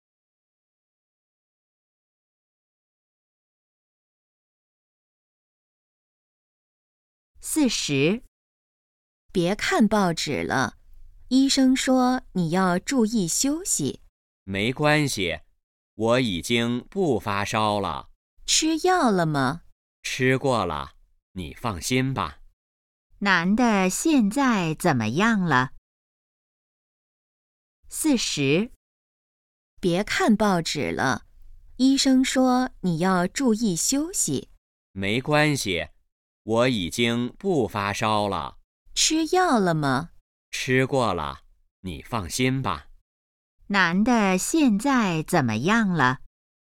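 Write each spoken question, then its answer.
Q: 男的现在怎么样了?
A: 已经不发烧了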